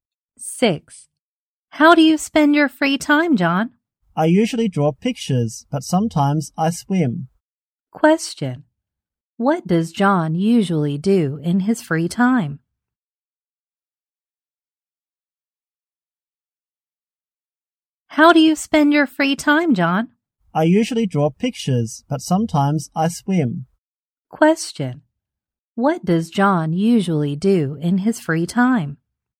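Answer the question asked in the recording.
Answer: He draws pictures.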